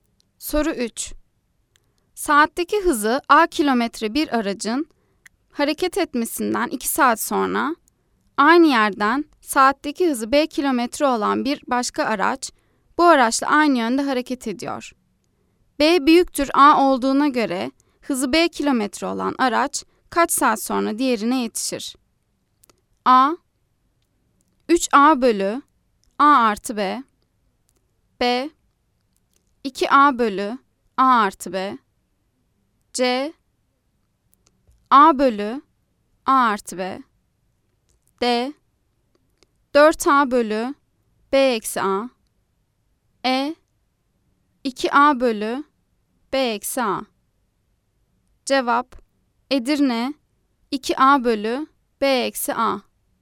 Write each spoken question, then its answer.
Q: B büyüktür A olduğuna göre hızı B kilometre olan araç kaç saat sonra diğerine yetişir?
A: Cevap Edirne 2A bölü B eksi A